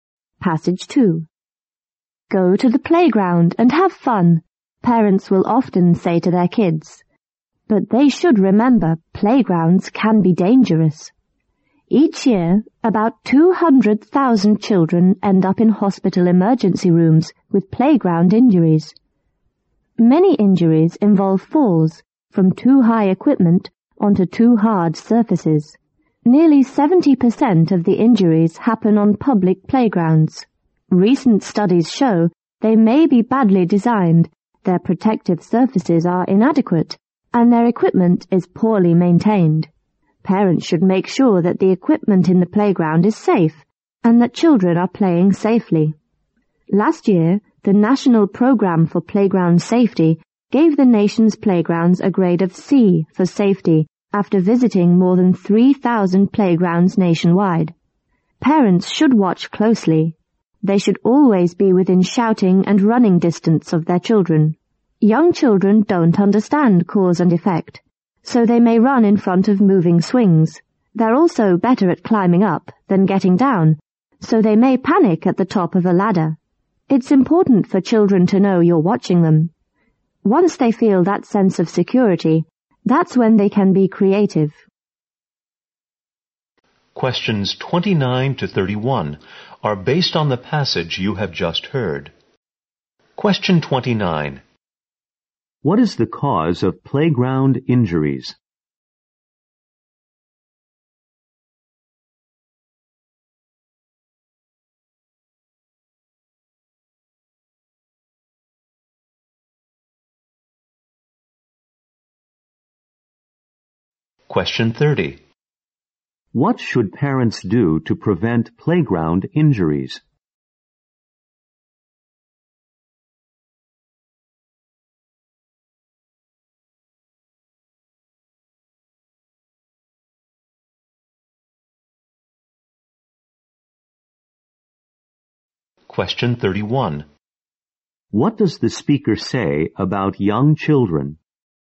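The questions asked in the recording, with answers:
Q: What should parents do to prevent playground injuries?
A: Watch their children closely and stay within shouting and running distance.

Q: What does the speaker say about young children?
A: They don't understand cause and effect.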